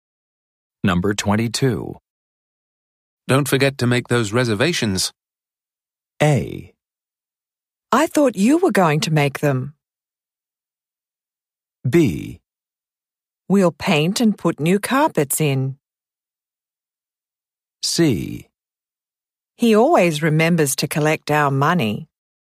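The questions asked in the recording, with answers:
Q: Don't forget to make those reservations.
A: A: I thought you were going to make them.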